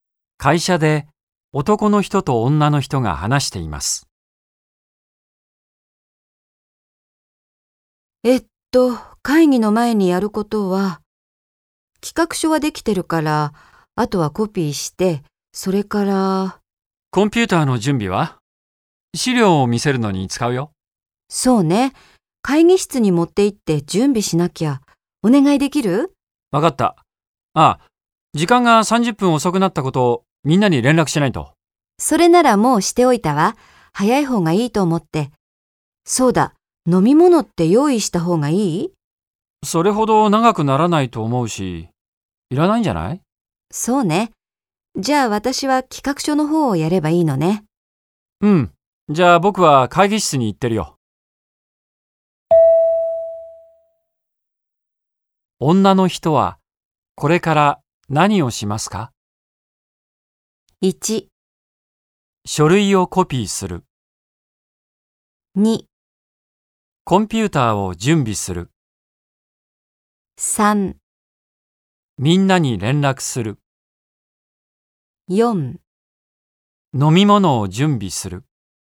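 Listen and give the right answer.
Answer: 1: 書類をコピーする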